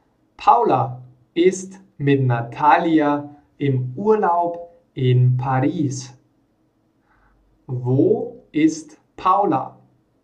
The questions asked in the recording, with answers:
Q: Wo ist Paula?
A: In Paris. Sie ist in Paris.